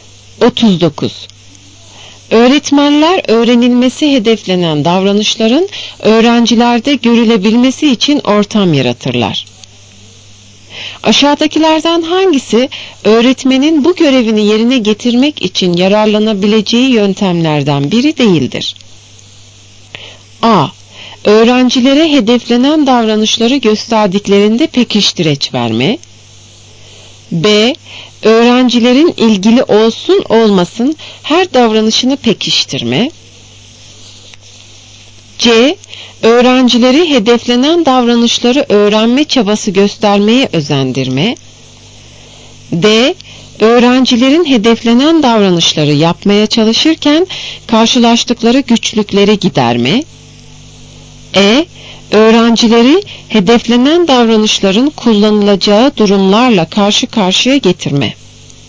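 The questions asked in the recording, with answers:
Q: Aşağıdakilerden hangisi öğretmenin bu görevini yerine getirmek için yararlanabileceği yöntemlerden biri değildir?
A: B: Öğrencilerin ilgili olsun olmasın her davranışını pekiştirme.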